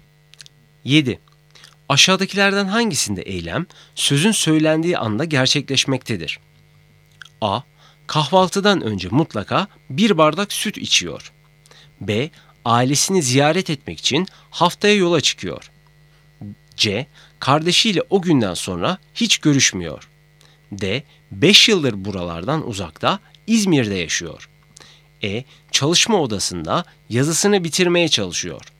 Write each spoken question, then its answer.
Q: Aşağıdakilerden hangisinde eylem sözün söylendiği anda gerçekleşmektedir?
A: Doğru cevap E. Çalışma odasında yazısını bitirmeye çalışıyor.